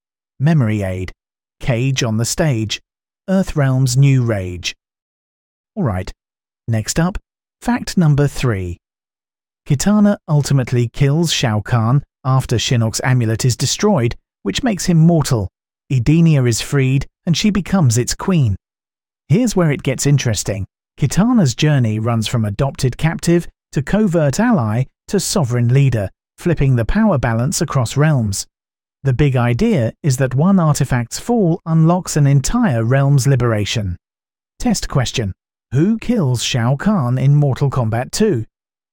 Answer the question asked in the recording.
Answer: Correct answer. Kitana.